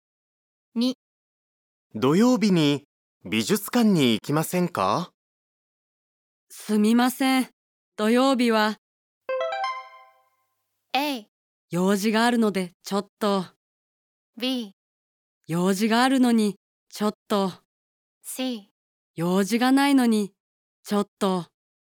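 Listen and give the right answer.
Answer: A: 用事があるのでちょっと。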